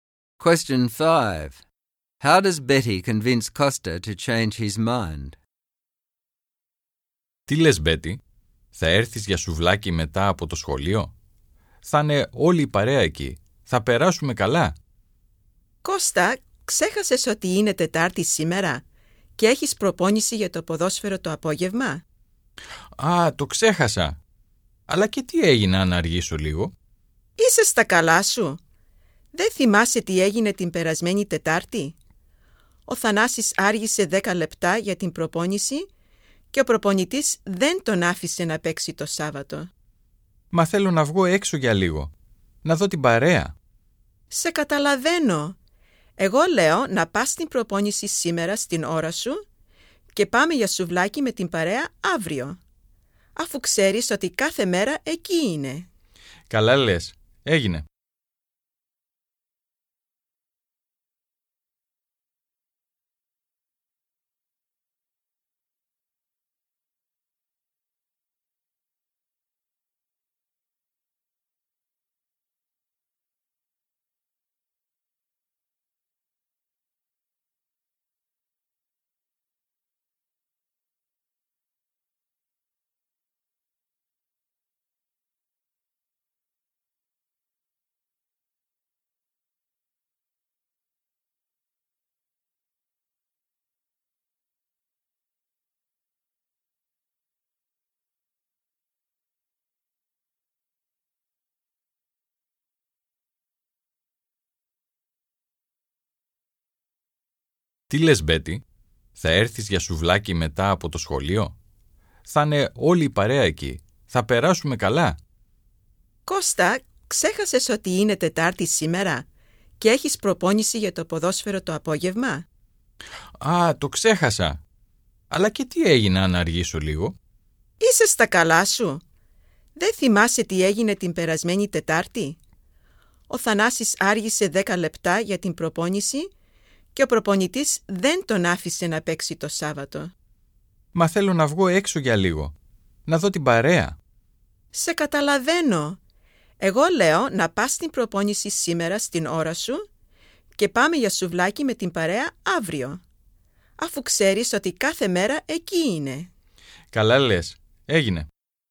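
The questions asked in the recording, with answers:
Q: How does Betty convince Costa to change his mind?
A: She reminds him that he has football training on Wednesday afternoon. Last week Thanasis was 10 minutes late and the coach didn't let him play on Saturday. She suggests he go to training on time and go for souvlaki with the group tomorrow, since they are there every day.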